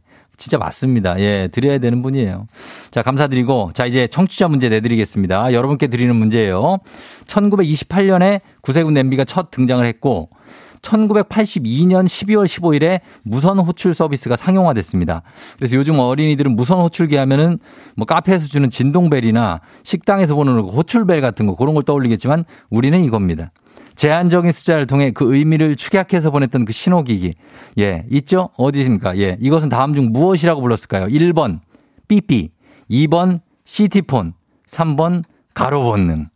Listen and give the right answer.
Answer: 정답 바로, 두구두구두구두구두구두구두구, 삐삐입니다.